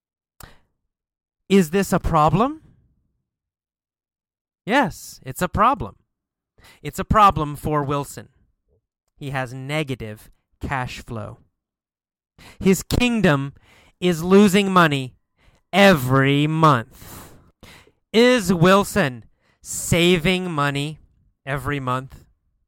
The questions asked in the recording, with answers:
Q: Is Wilson saving money every month?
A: No, he's not saving money every month.